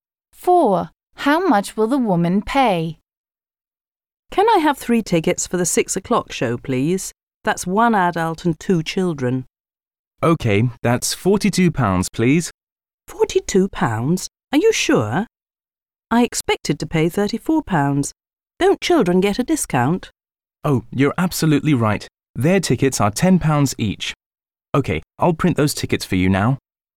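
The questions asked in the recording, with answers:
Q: How much will the woman pay?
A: £34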